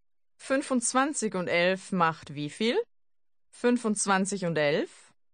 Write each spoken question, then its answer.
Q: 25 und 11 macht wie viel?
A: 36. 25 und 11 macht 36.